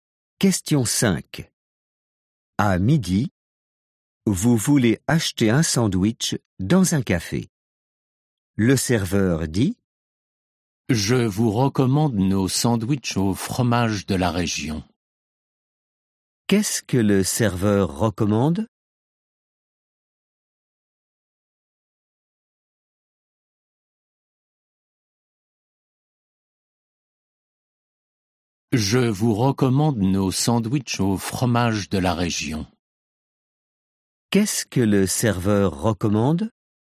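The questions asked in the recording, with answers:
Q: Qu'est-ce que le serveur recommande ?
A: Les sandwichs au fromage de la région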